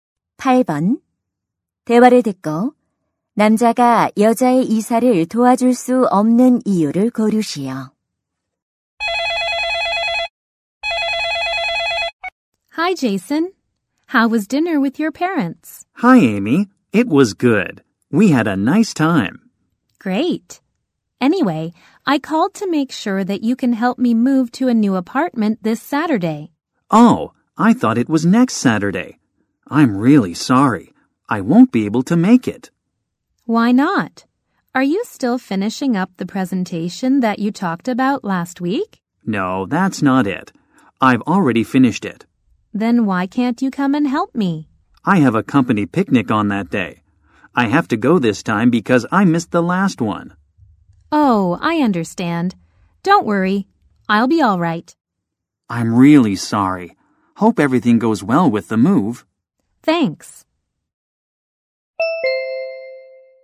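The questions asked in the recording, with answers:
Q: 대화를 듣고 남자가 여자의 이사를 도와줄 수 없는 이유를 고르시오.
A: 회사 야유회에 가야 해서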